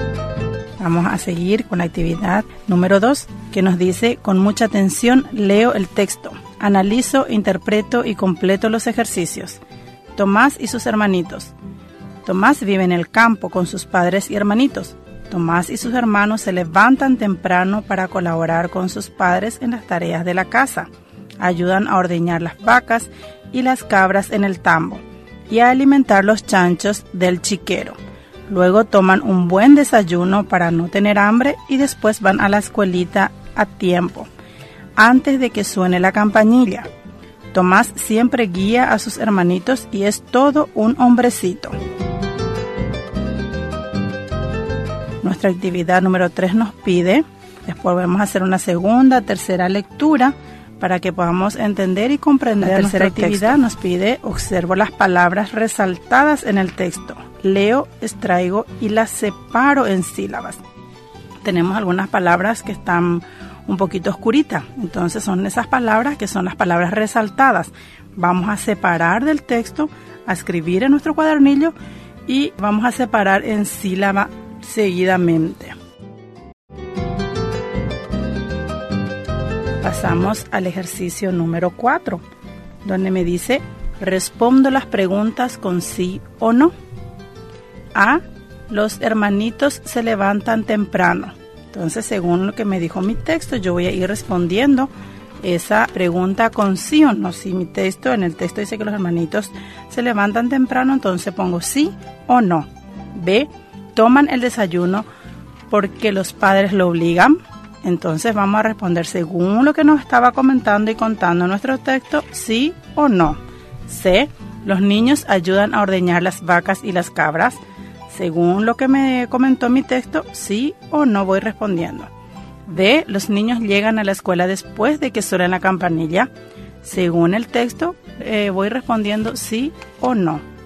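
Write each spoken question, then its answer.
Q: A, los hermanitos se levantan temprano.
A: Sí

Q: B, toman el desayuno porque los padres lo obligan.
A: No

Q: C, los niños ayudan a ordeñar las vacas y las cabras.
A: Sí

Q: D, los niños llegan a la escuela después de que suene la campanilla.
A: No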